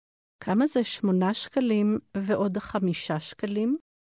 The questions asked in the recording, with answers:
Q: כמה זה 8 שקלים ועוד 5 שקלים?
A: 13 שקלים.